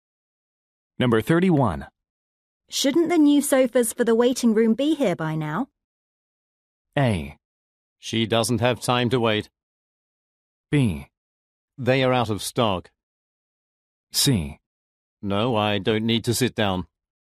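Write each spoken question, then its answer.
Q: Shouldn't the new sofas for the waiting room be here by now?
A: B: They are out of stock.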